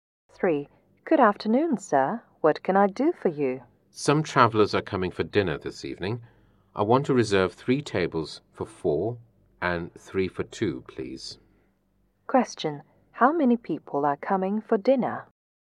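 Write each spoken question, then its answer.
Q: How many people are coming for dinner?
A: 18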